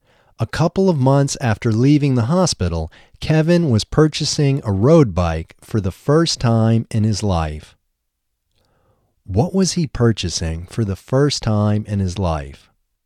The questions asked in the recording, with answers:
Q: What was he purchasing for the first time in his life?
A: He was purchasing a road bike for the first time in his life.